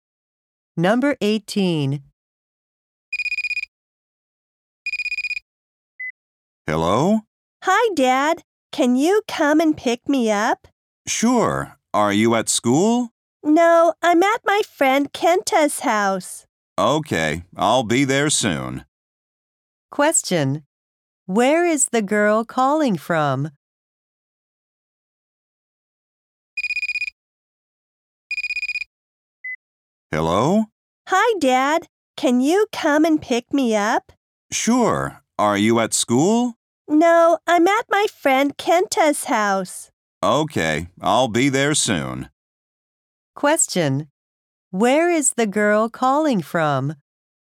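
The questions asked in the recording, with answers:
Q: Where is the girl calling from?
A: Her friend Kenta's house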